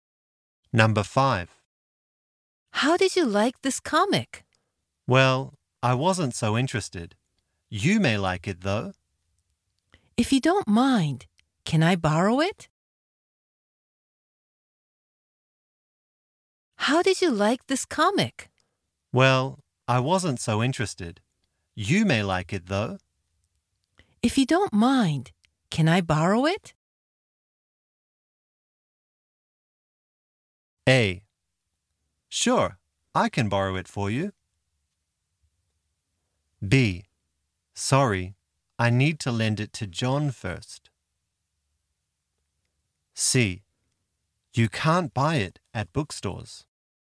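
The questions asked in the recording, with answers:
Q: If you don't mind, can I borrow it?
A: B: Sorry, I need to lend it to John first.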